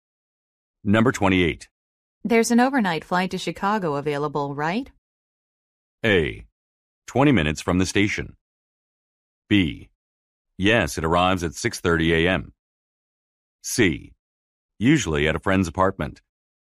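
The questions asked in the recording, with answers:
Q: There's an overnight flight to Chicago available, right?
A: B: Yes, it arrives at 6:30 a.m.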